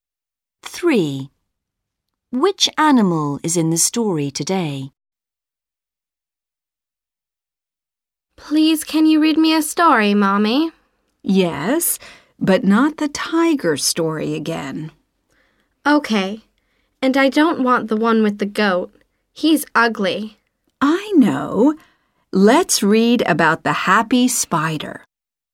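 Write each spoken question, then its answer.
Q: Which animal is in the story today?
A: A spider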